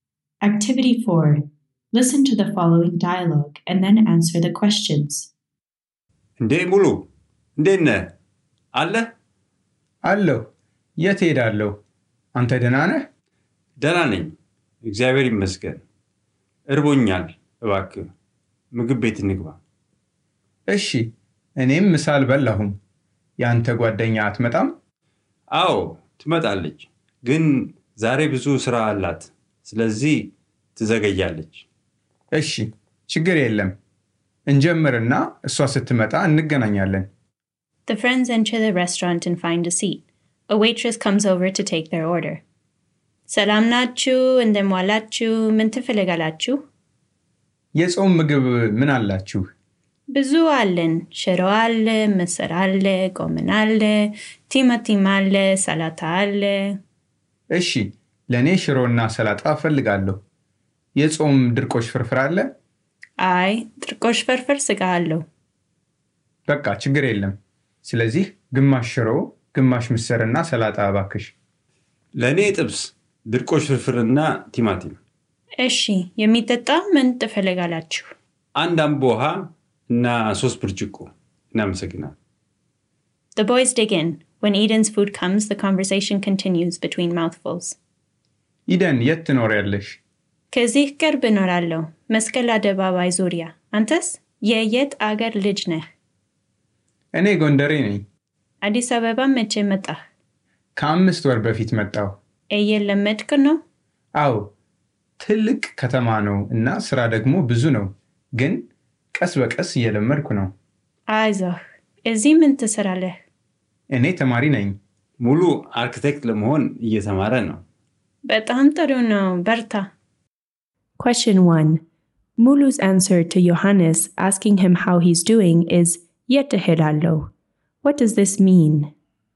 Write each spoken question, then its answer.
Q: Mulu's answer to Johannes asking him how he's doing is Yete alo. What does this mean?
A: Where else would I be?